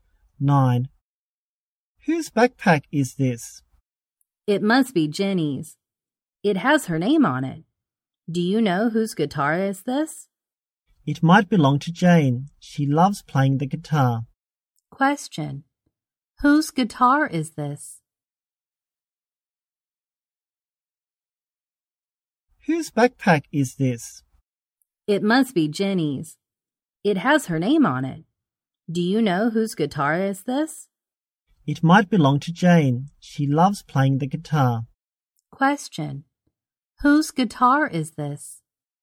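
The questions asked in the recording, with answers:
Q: Whose guitar is this?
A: Jane's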